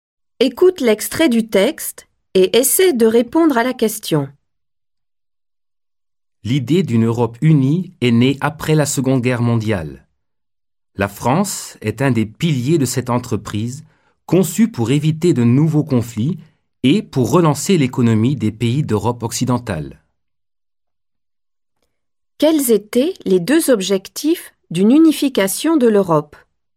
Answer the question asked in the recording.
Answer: Les objectifs étaient d'éviter de nouveaux conflits et de relancer l'économie.